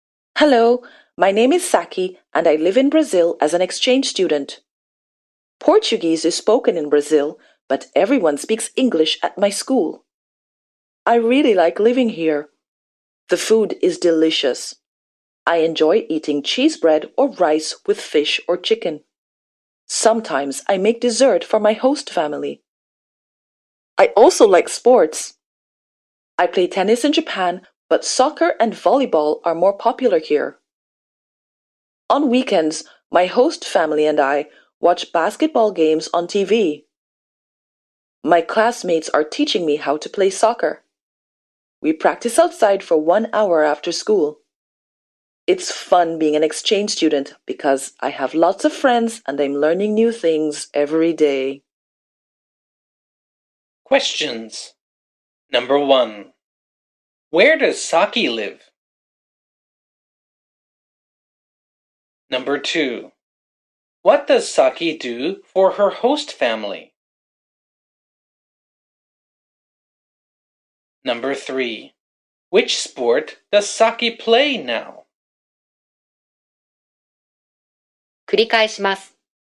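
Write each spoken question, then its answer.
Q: Where does Saki live?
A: In Brazil

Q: What does Saki do for her host family?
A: She sometimes makes dessert

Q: Which sport does Saki play now?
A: Soccer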